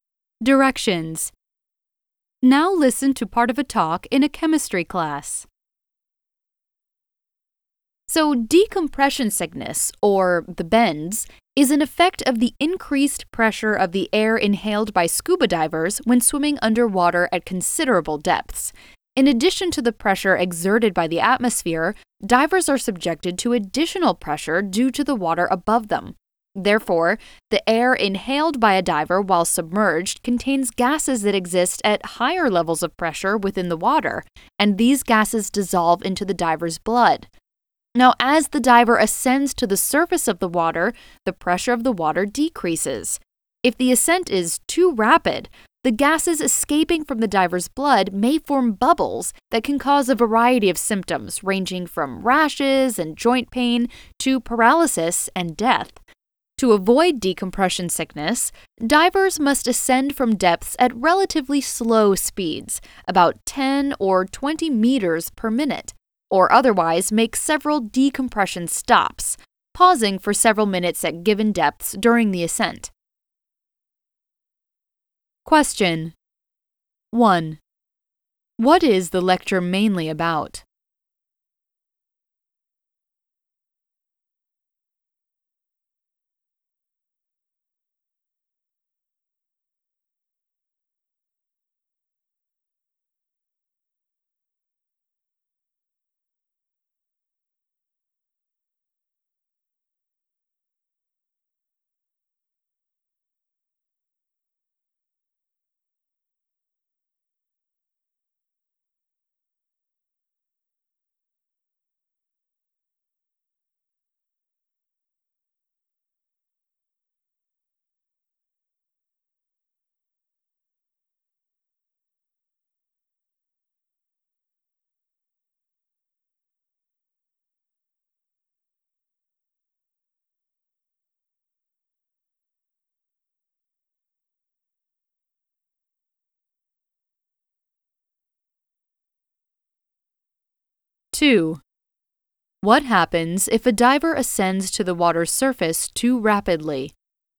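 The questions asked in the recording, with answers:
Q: What is the lecture mainly about?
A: Decompression sickness (the bends) in scuba divers and how to avoid it

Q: What happens if a diver ascends to the water's surface too rapidly?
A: Gases escaping from the blood may form bubbles, causing symptoms from rashes and joint pain to paralysis and death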